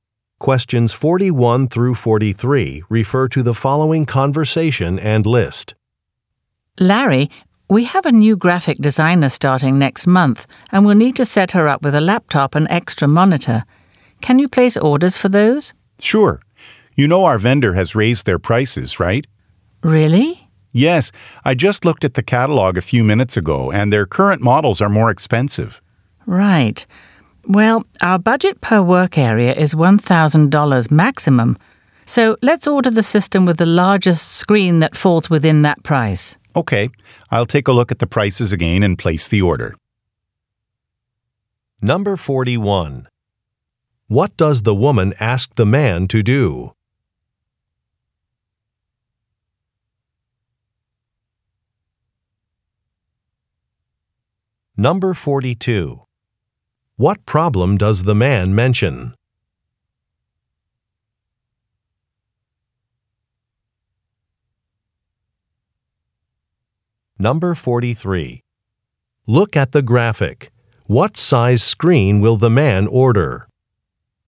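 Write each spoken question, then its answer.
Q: What does the woman ask the man to do?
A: Order a laptop and an extra monitor for a new graphic designer

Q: What problem does the man mention?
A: The vendor has raised its prices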